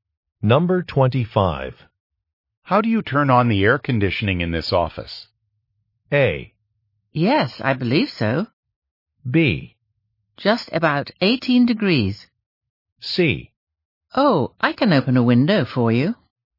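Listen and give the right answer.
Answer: C: Oh, I can open a window for you.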